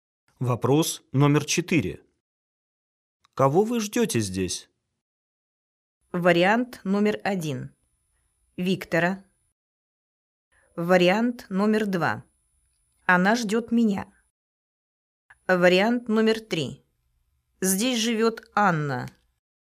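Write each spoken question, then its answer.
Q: Кого вы ждете здесь?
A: 1: Виктора.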